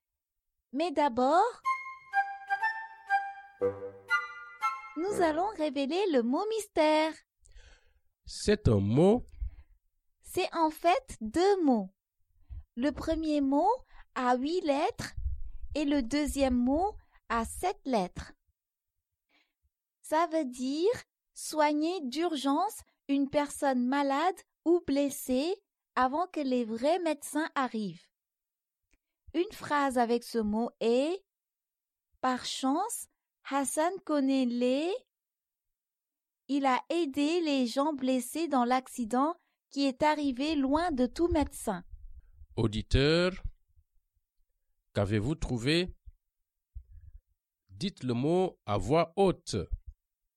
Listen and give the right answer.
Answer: Le mot mystère est premier secours.